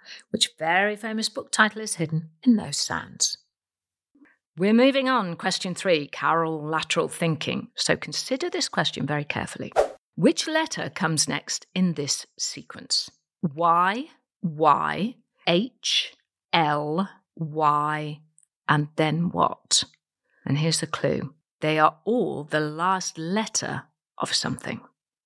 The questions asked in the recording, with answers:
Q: Which letter comes next in this sequence?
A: And the answer is E.